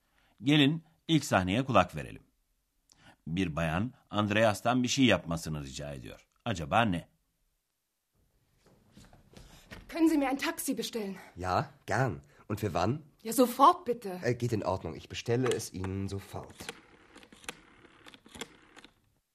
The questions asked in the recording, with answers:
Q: Acaba ne?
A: Bir bayan Andreas'a bir taksi çağırıp çağıramayacağını soruyordu.